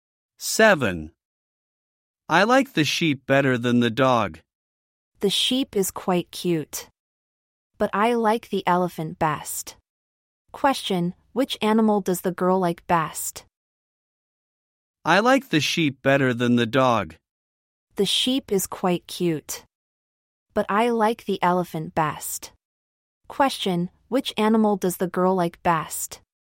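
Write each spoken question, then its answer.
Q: Question, which animal does the girl like best?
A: The elephant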